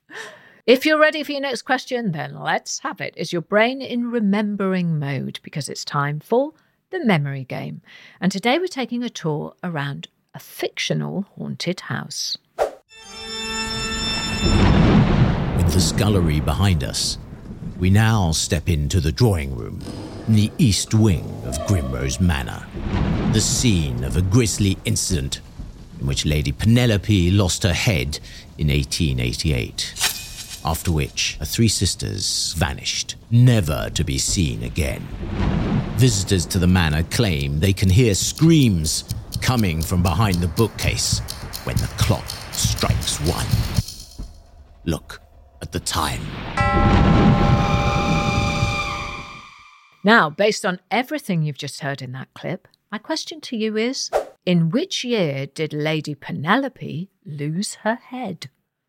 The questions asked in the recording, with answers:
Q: in which year did Lady Penelope lose her head?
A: And the answer, I'm sure you all recalled, was 1888.